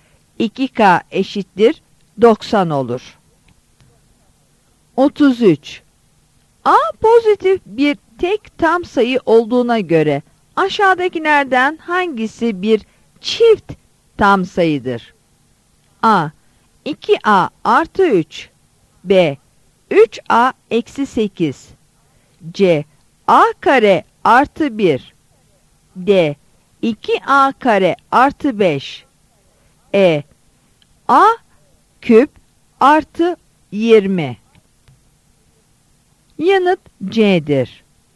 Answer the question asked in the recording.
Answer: Yanıt C'dir.